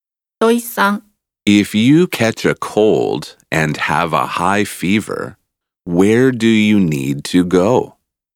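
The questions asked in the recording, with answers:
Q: If you catch a cold and have a high fever, where do you need to go?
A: To a hospital (a doctor)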